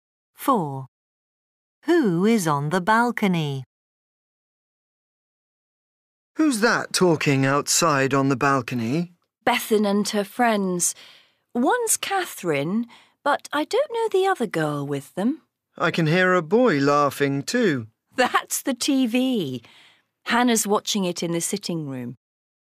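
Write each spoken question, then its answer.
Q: Who is on the balcony?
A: Bethan and two girlfriends (Catherine and another girl)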